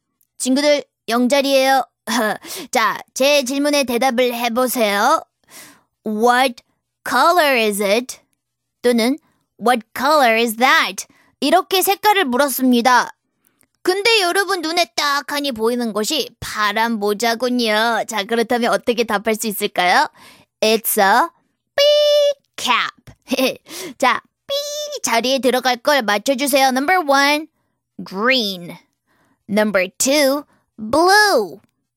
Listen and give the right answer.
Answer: 네, 여러분 정답은 몇 번인가요? 바로 number 2!